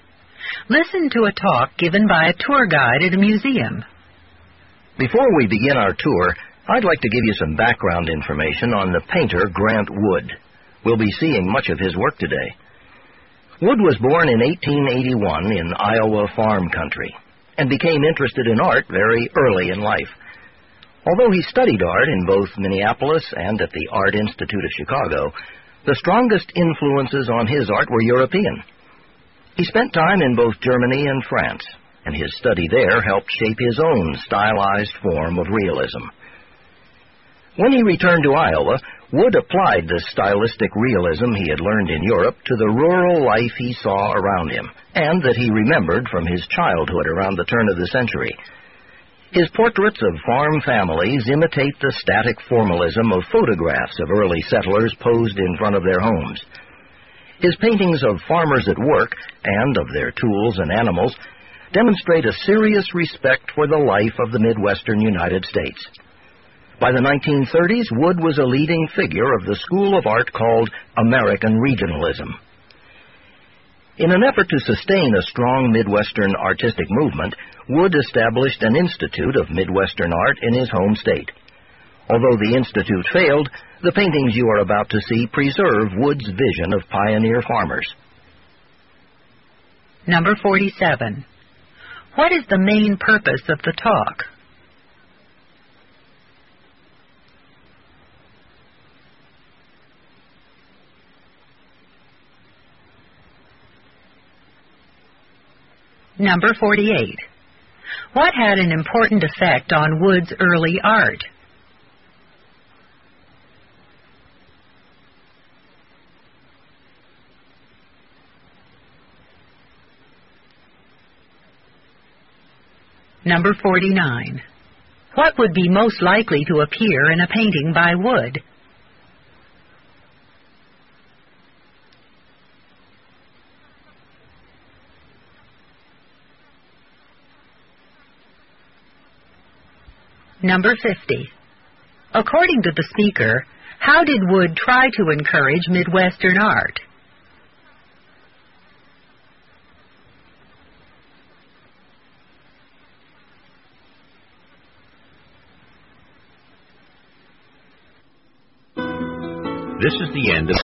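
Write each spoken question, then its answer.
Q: What is the main purpose of the talk?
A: To give background information on the painter Grant Wood before a museum tour

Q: What had an important effect on Wood's early art?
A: His study in Europe (Germany and France)

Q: What would be most likely to appear in a painting by Wood?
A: Farmers at work or a farm family in front of their home

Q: According to the speaker, how did Wood try to encourage Midwestern art?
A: He established an institute of Midwestern art in Iowa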